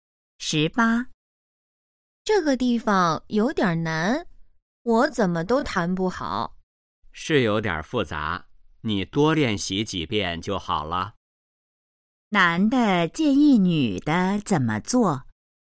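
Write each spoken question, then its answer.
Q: 男的建议女的怎么做?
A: 多练习几遍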